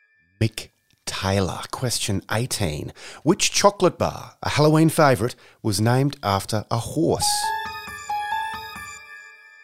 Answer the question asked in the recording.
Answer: The Snickers Bar.